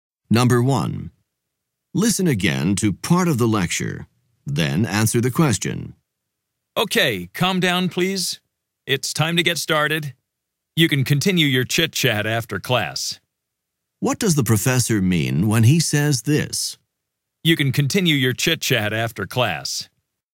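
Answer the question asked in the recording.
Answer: He wants the students to stop talking so the class can start.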